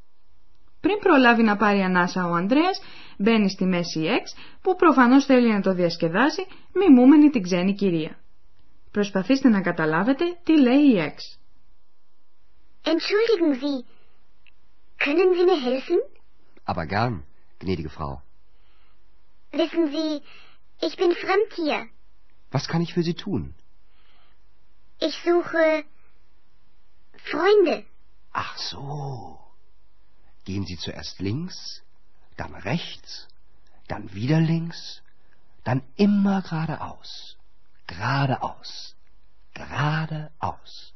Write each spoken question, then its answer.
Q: Προσπαθήστε να καταλάβετε τι λέει η Έξ.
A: Η Έξ λέει πως ψάχνει για φίλους.